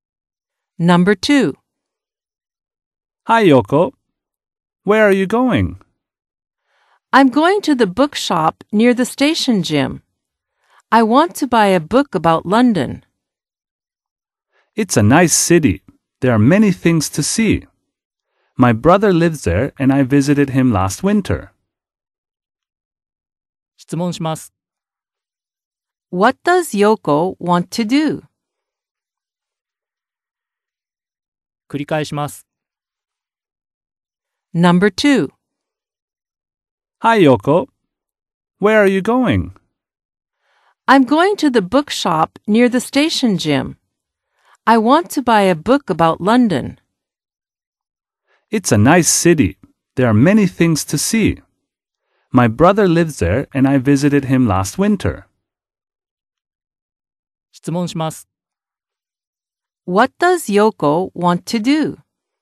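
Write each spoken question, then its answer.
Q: What does Yoko want to do?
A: She wants to buy a book about London.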